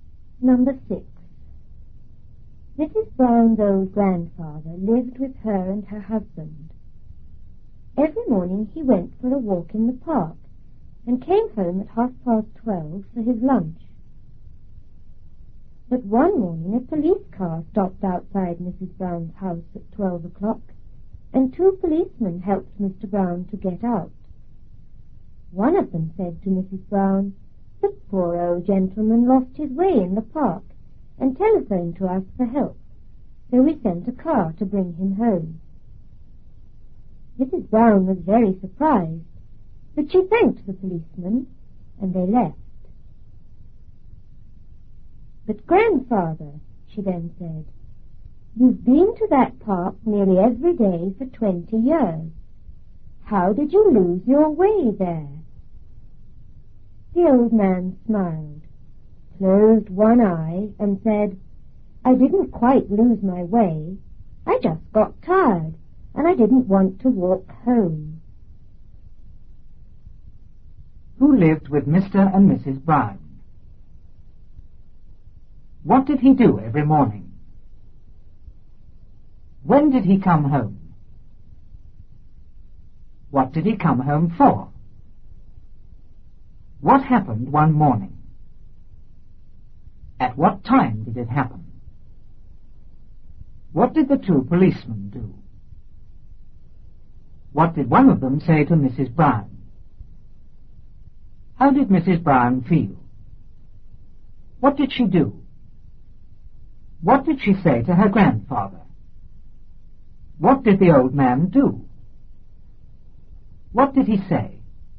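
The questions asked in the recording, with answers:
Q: Who lived with Mr. and Mrs. Brown?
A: Mrs. Brown's old grandfather

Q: What did he do every morning?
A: He went for a walk in the park

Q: When did he come home?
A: At 12:30

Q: What did he come home for?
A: For his lunch

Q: What happened one morning?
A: A police car stopped outside the house and two policemen helped him get out

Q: At what time did it happen?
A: At 12:00

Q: What did the two policemen do?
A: They helped him get out of the car

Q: What did one of them say to Mrs. Brown?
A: The old gentleman lost his way in the park and phoned for help, so they brought him home

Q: How did Mrs. Brown feel?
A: Very surprised

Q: What did she do?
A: She thanked the policeman

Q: What did she say to her grandfather?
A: He had been to that park nearly every day for 20 years, so how did he lose his way?

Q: What did the old man do?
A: He smiled and closed one eye

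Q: What did he say?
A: He didn't quite lose his way; he just got tired and didn't want to walk home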